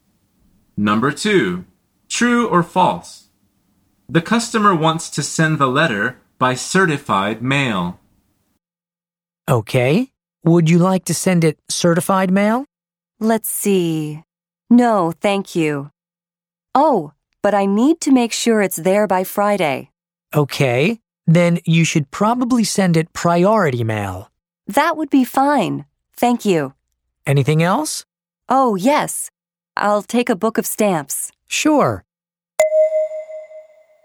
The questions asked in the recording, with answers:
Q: True or false? The customer wants to send the letter by certified mail.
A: The answer is false. The postal worker says, then you should probably send it by priority mail.